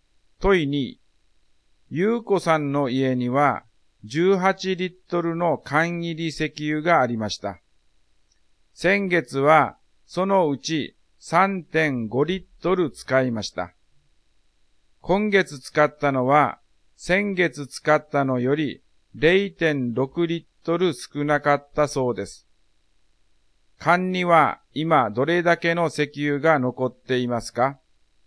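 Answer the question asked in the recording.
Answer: 11.6リットル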